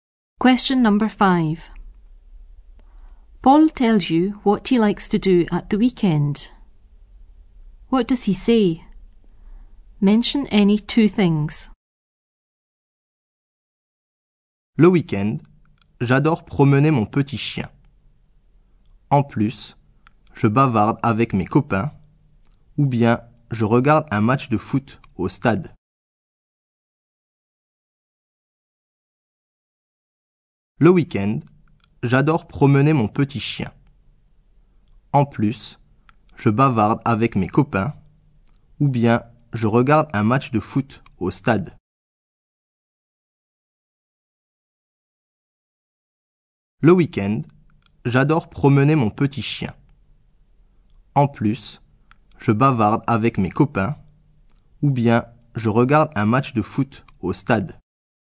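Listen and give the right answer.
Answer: He walks his little dog, chats with his friends, or watches a football match at the stadium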